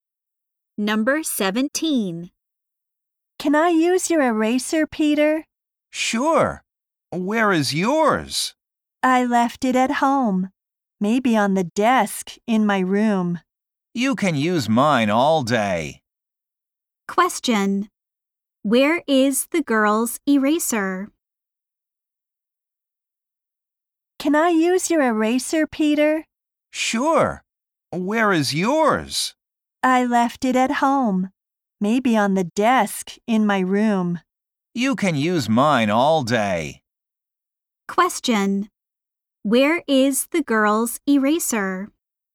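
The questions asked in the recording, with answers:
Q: Where is the girl's eraser?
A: At home, maybe on the desk in her room.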